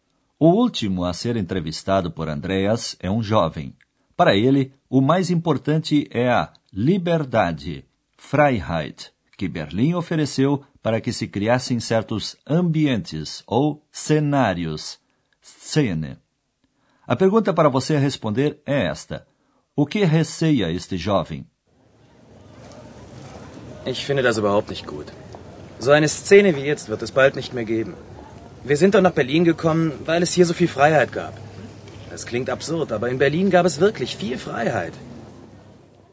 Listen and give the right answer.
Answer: O jovem teme o seguinte: ambientes como esses de agora, dentro em breve, não existirão mais.